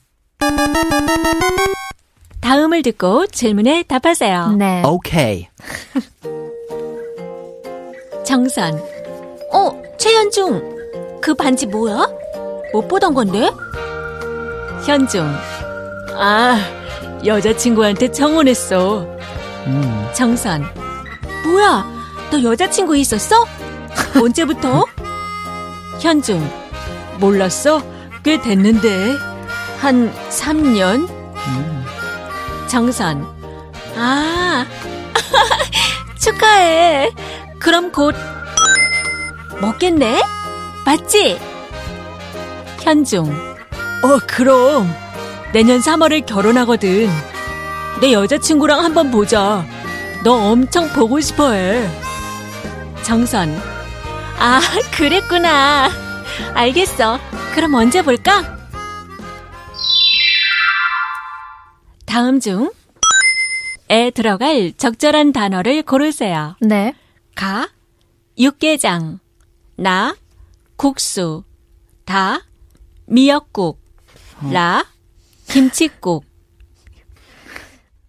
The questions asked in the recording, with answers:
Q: 다음 중 에 들어갈 적절한 단어를 고르세요.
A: Kuksu is correct because it is what's traditionally served at a wedding feast.